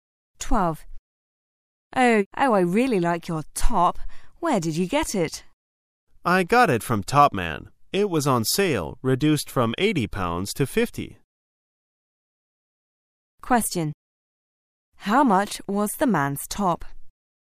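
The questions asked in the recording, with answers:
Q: How much was the man's top?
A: £50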